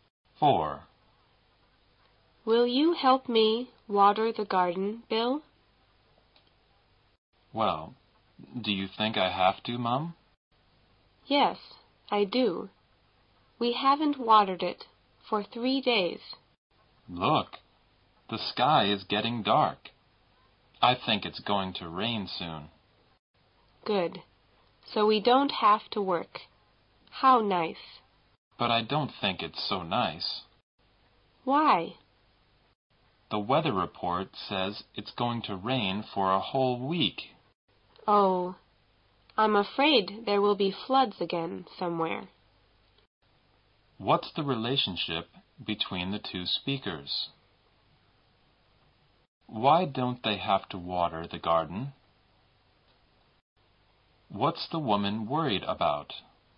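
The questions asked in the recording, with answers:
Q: What's the relationship between the two speakers?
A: Mother and son

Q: Why don't they have to water the garden?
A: Because it's going to rain soon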